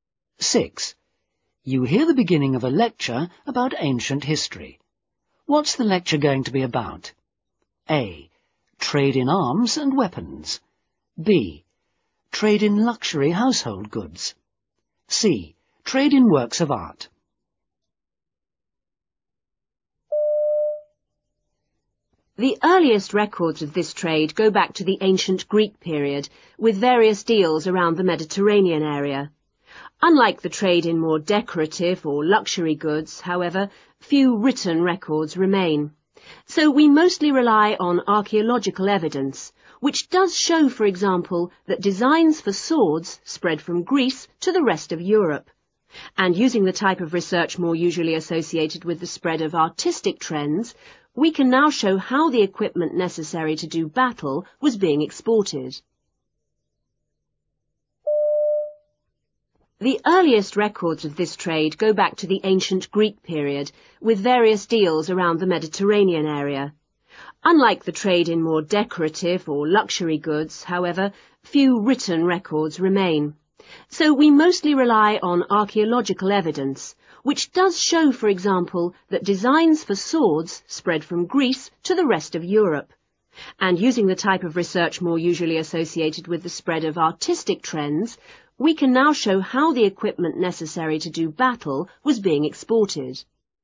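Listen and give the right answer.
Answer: A: Trade in arms and weapons.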